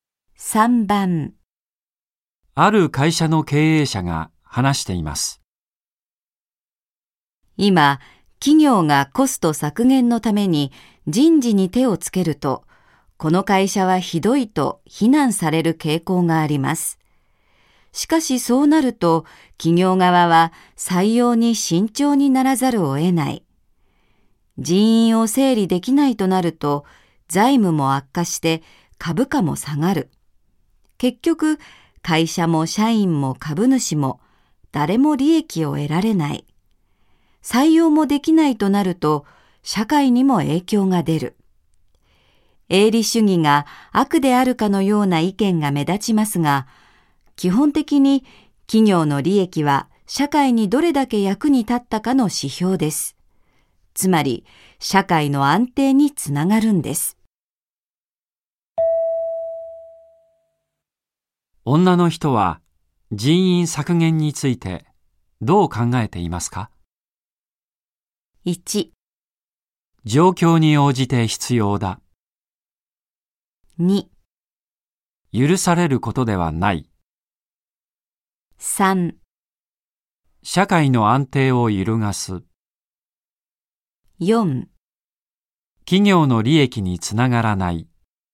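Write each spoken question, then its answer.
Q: 女の人は人員削減についてどう考えていますか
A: 1: 状況に応じて必要だ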